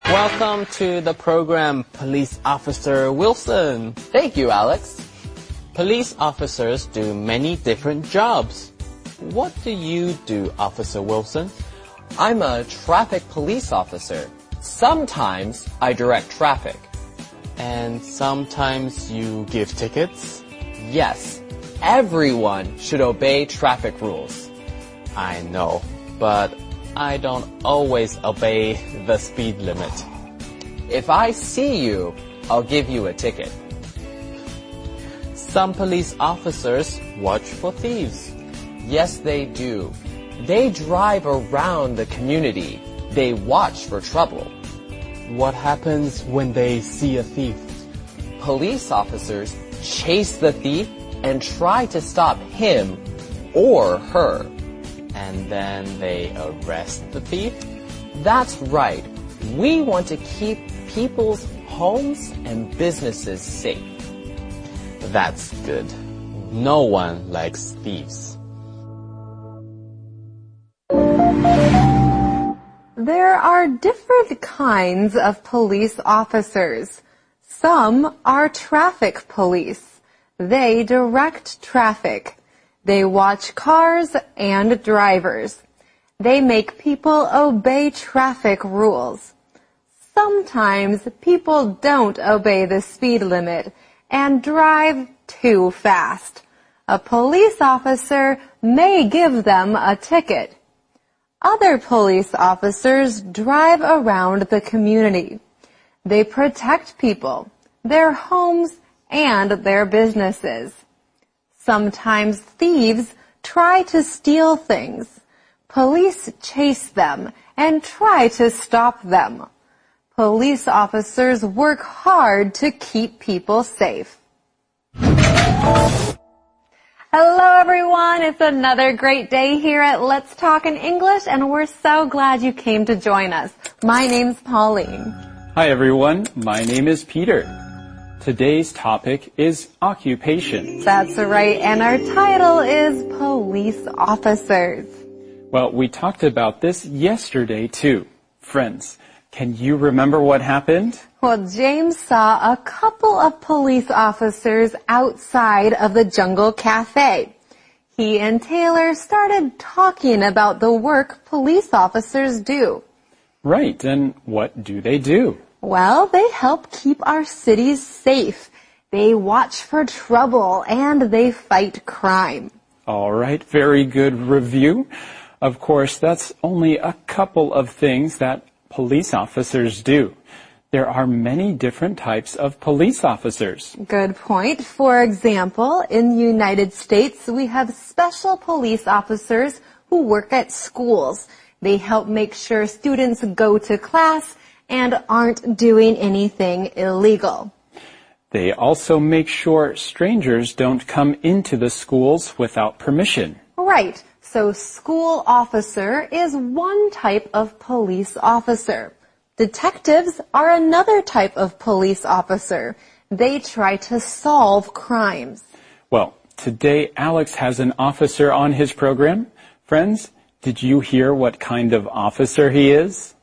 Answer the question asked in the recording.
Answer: That's right. He's a traffic officer.